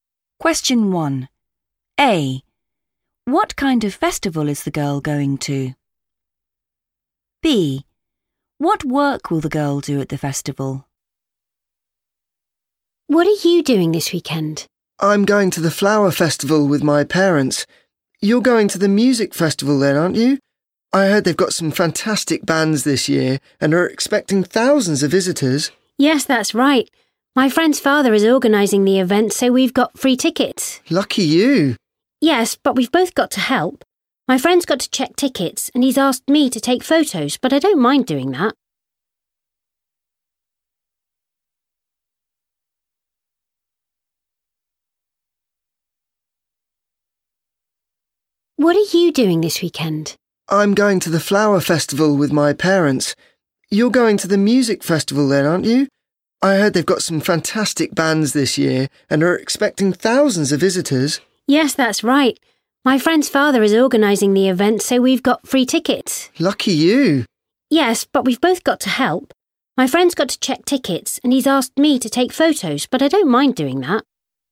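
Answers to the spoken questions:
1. music festival
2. take photos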